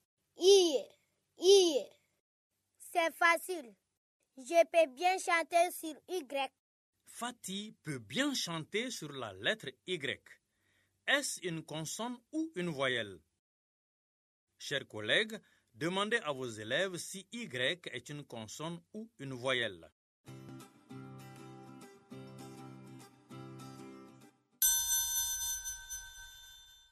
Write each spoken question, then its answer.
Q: Est-ce une consonne ou une voyelle?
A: est une voyelle.